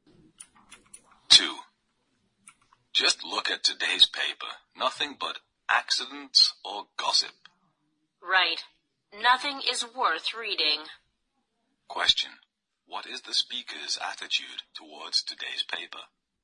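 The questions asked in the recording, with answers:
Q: What is the speaker's attitude towards today's paper?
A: Critical; nothing in it is worth reading.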